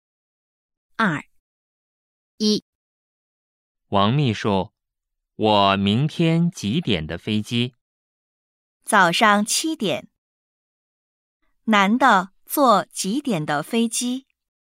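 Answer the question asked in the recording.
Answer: 早上七点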